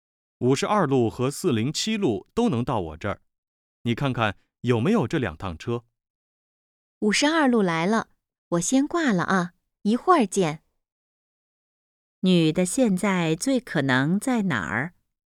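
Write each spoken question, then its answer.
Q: 女的现在最可能在哪儿?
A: 公交车站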